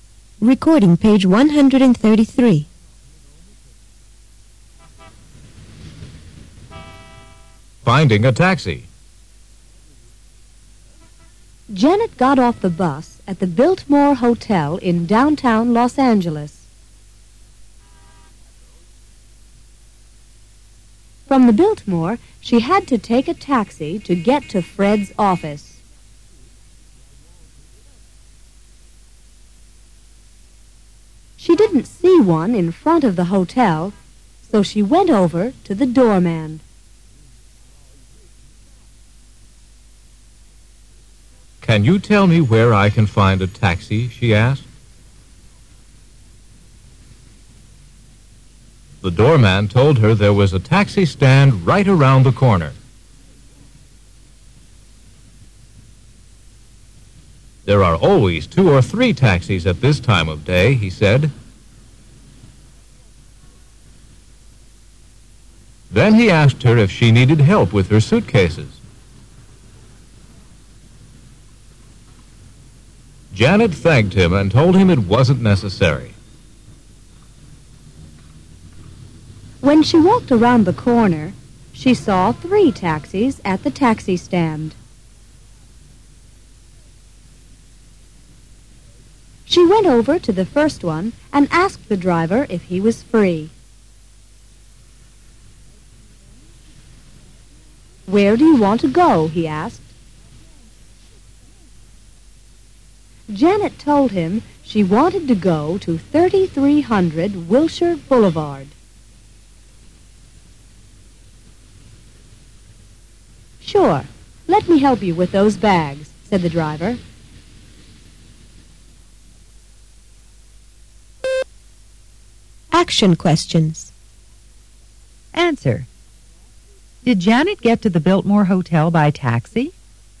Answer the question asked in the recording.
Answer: No, she didn't.